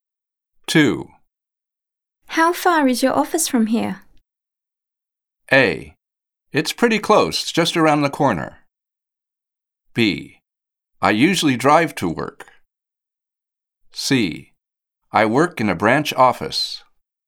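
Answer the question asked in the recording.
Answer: A: It's pretty close, just around the corner.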